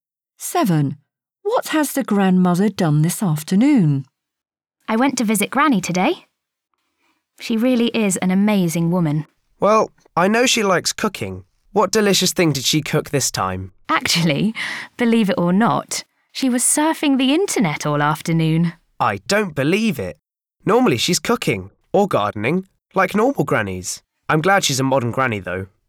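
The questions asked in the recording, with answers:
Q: What has the grandmother done this afternoon?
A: surfed the internet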